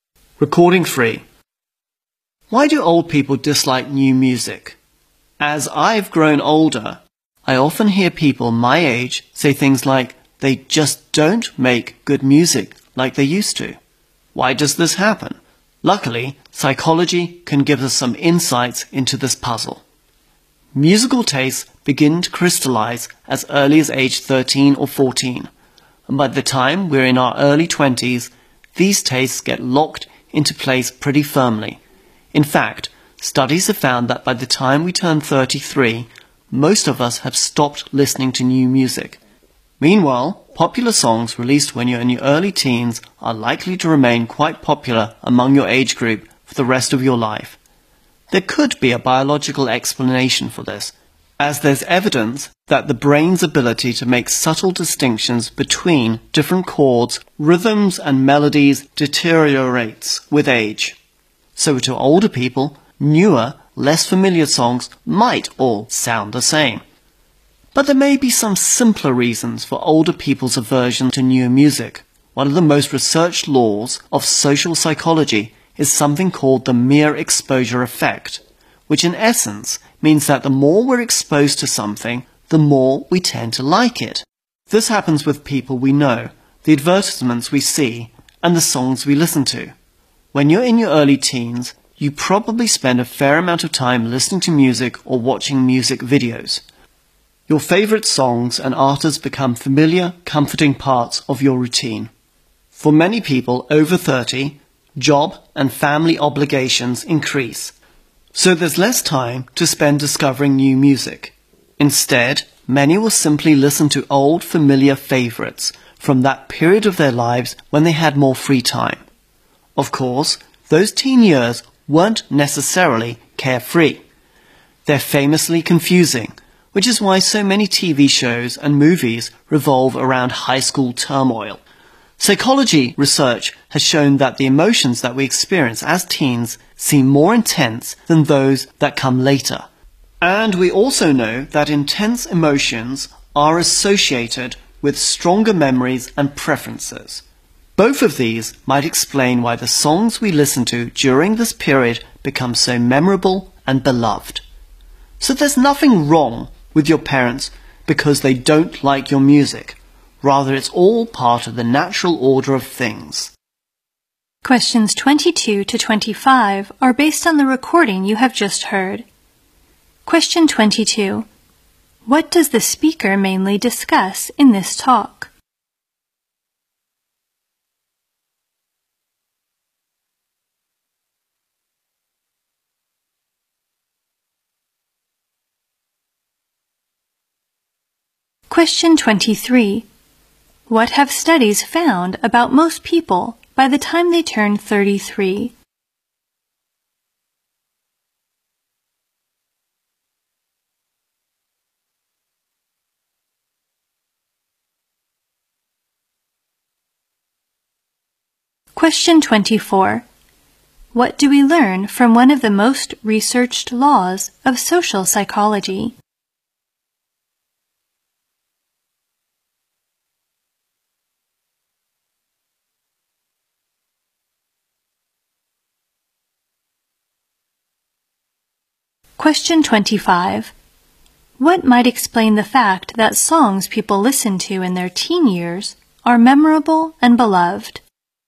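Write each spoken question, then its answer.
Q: What does the speaker mainly discuss in this talk?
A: Why older people dislike new music.

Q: What have studies found about most people by the time they turn 33?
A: Most have stopped listening to new music.

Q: What do we learn from one of the most researched laws of social psychology?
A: The more we're exposed to something, the more we tend to like it.

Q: What might explain the fact that songs people listen to in their teen years are memorable and beloved?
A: Teen emotions are more intense, and intense emotions lead to stronger memories and preferences.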